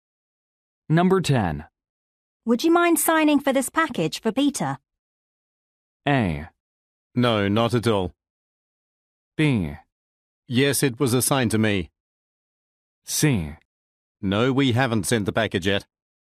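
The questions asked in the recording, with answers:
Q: Would you mind signing for this package for Peter?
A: A: No, not at all.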